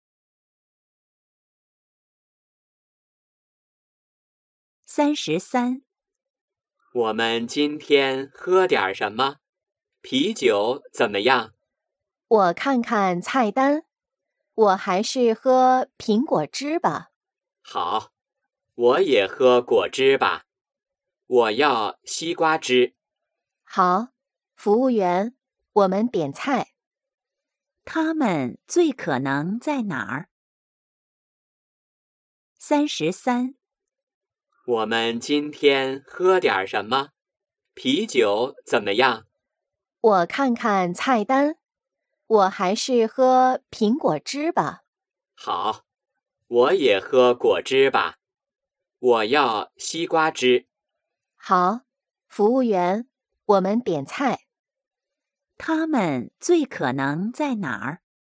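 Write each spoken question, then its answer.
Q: 他们最可能在哪儿?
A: 饭馆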